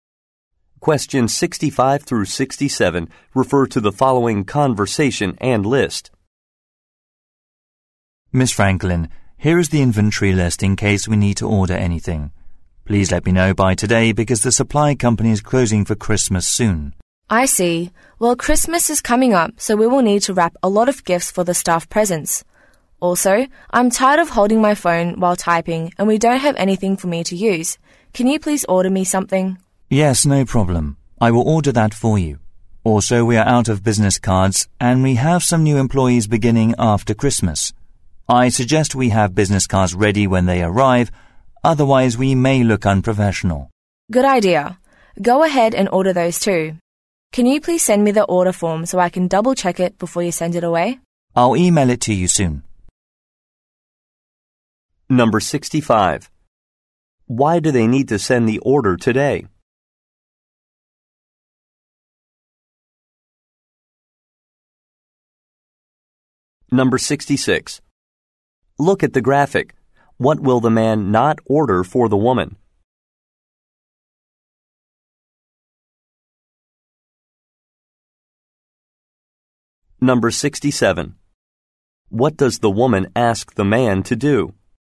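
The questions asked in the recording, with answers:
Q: Why do they need to send the order today?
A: The supply company is closing for Christmas soon

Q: What does the woman ask the man to do?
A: Send her the order form to double-check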